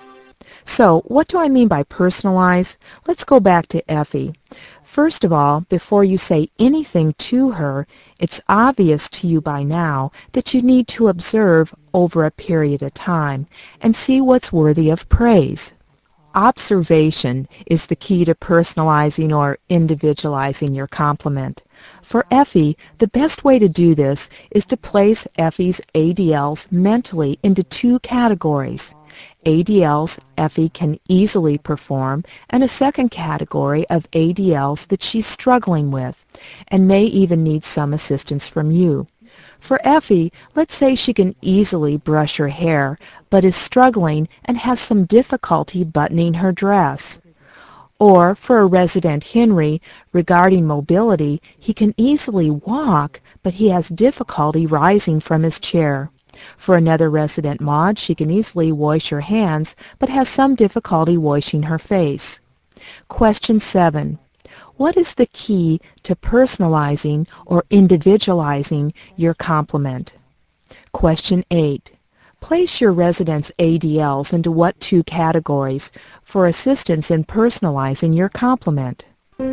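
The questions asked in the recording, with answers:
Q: What is the key to personalizing or individualizing your compliment?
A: Observation

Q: Place your resident's ADLs into what 2 categories for assistance in personalizing your compliment?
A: ADLs the resident can easily perform, and ADLs the resident struggles with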